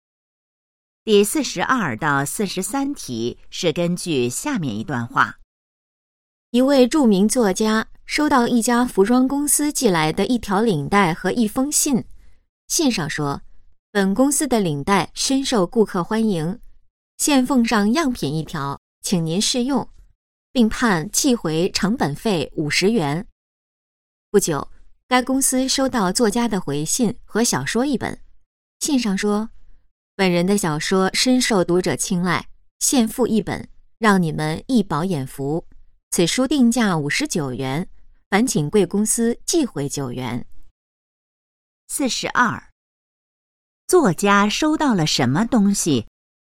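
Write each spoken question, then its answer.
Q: 作家收到了什么东西?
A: 一条领带和一封信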